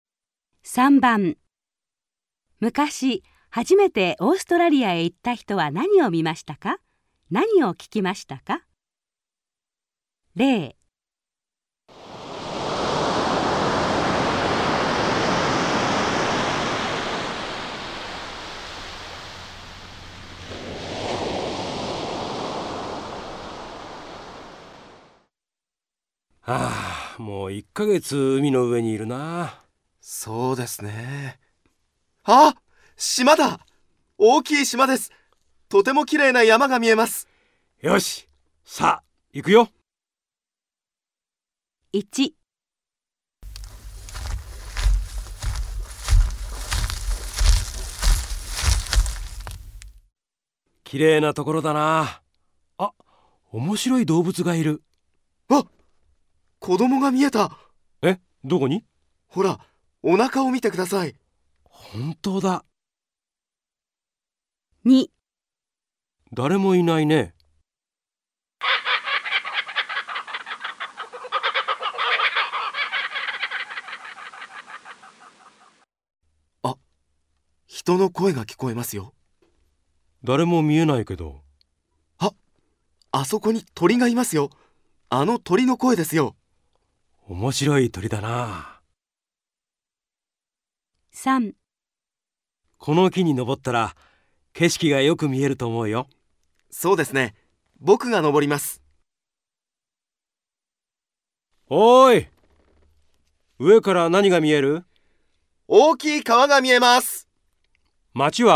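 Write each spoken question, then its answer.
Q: 昔、初めてオーストラリアへ行った人は何を見ましたか?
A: お腹に子供がいる面白い動物

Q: 何を聞きましたか?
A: 人の声のように聞こえる鳥の声

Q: 昔、初めてオーストラリアへ行った人は何を見ましたか?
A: 大きい川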